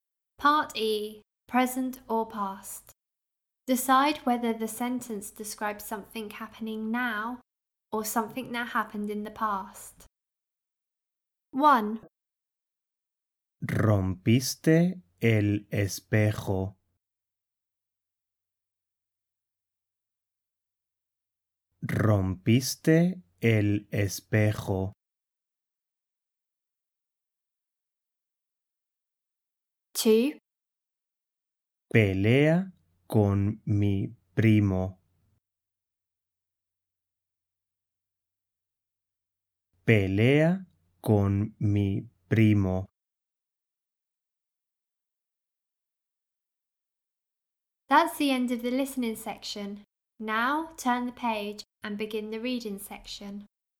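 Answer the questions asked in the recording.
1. past
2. now (present)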